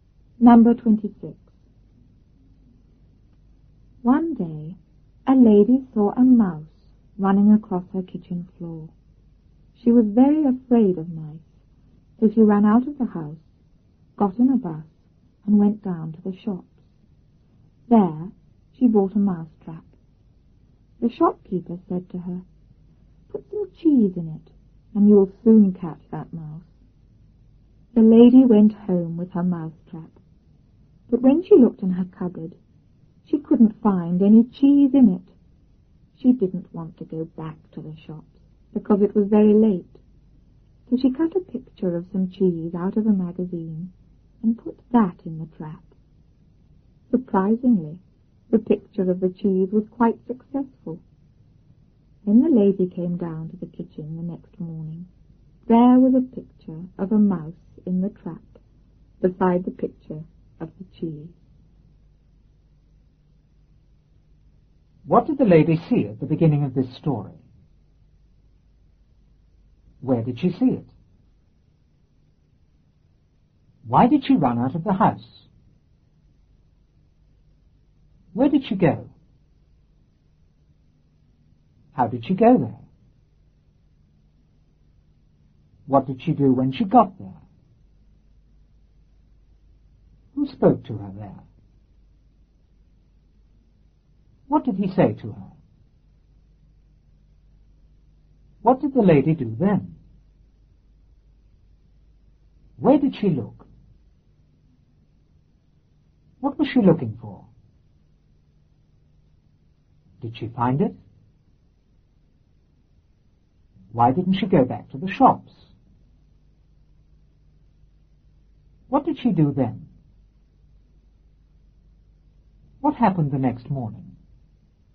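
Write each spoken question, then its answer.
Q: What did the lady see at the beginning of this story?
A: A mouse running across her kitchen floor

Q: Where did she see it?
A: On her kitchen floor

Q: Why did she run out of the house?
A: She was very afraid of mice

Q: Where did she go?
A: Down to the shops

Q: How did she go there?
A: By bus

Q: What did she do when she got there?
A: She bought a mouse trap

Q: Who spoke to her there?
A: The shopkeeper

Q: What did he say to her?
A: Put some cheese in it, and you'll soon catch that mouse

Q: What did the lady do then?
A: She went home with her mouse trap

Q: Where did she look?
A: In her cupboard

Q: What was she looking for?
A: Cheese

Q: Did she find it?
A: No

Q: Why didn't she go back to the shops?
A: Because it was very late

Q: What did she do then?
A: She cut a picture of cheese out of a magazine and put it in the trap

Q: What happened the next morning?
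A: There was a picture of a mouse in the trap beside the picture of the cheese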